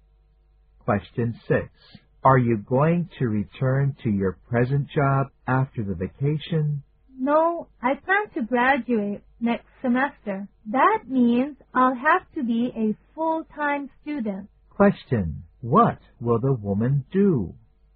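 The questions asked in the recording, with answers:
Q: What will the woman do?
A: Go back to school as a full-time student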